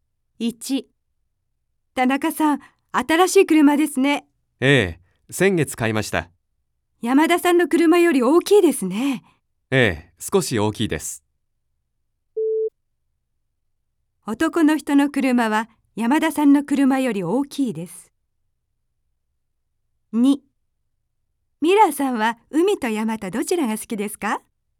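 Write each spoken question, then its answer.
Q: 男の人の車は山田さんの車より大きいです。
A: ○ (正しい)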